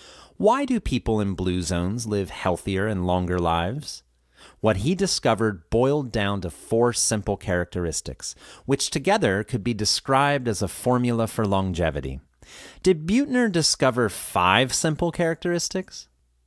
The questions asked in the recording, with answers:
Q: Did Buettner discover five simple characteristics?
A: No, he discovered four of them.